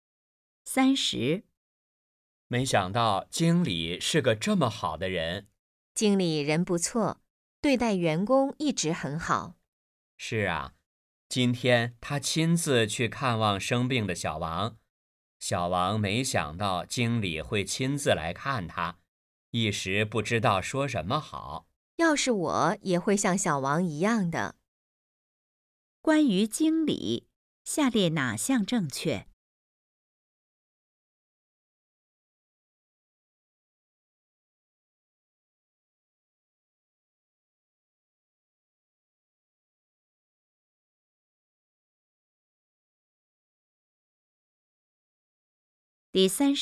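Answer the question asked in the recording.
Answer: 经理对待员工很好,亲自去看望生病的小王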